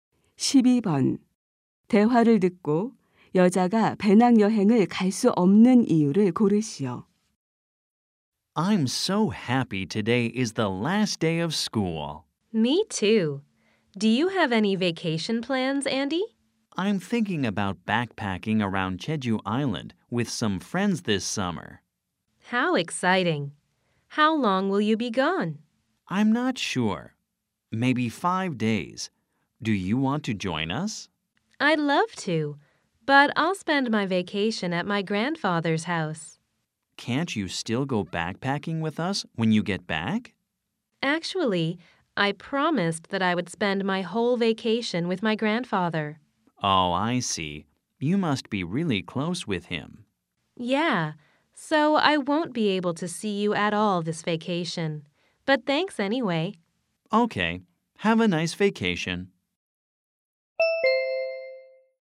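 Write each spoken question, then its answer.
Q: 대화를 듣고 여자가 배낭 여행을 갈 수 없는 이유를 고르시오.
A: 방학 내내 할아버지 댁에서 지내기로 약속해서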